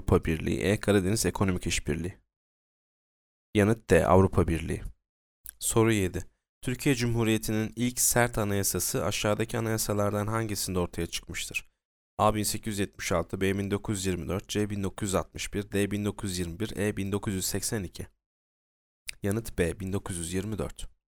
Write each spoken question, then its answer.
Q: Türkiye Cumhuriyeti'nin ilk sert anayasası aşağıdaki anayasalardan hangisinde ortaya çıkmıştır?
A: Yanıt B. 1924.